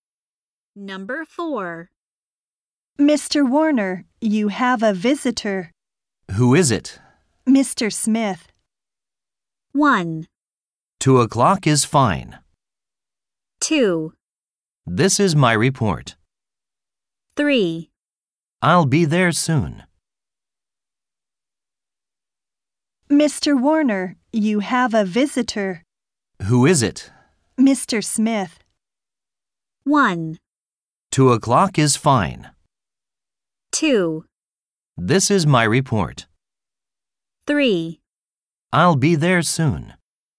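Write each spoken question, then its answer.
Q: Mr. Smith.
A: 3: I'll be there soon.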